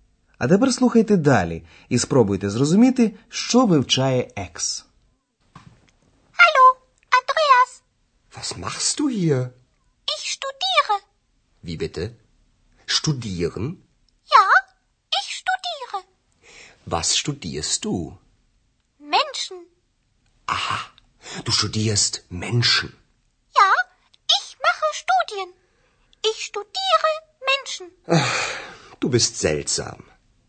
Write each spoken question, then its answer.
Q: А тепер слухайте далі і спробуйте зрозуміти, що вивчає екс.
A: Отже, екс вивчає людей.